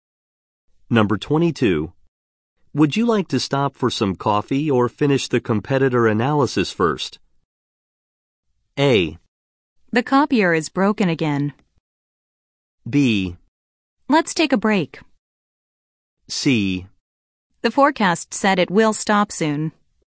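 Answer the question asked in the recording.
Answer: B: Let's take a break.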